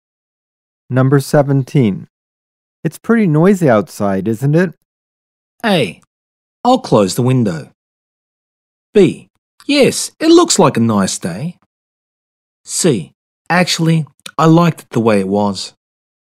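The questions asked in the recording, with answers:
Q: It's pretty noisy outside, isn't it?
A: A: I'll close the window.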